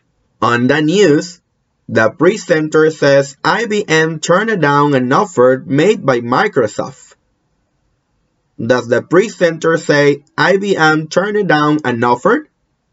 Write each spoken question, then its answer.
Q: Does the presenter say IBM turned down an offer?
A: Yes, he does.